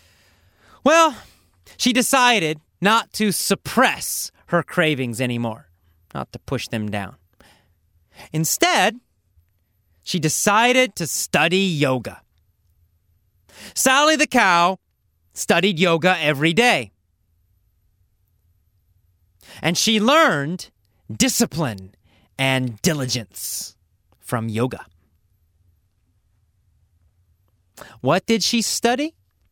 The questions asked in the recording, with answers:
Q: What did she study?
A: She learned yoga.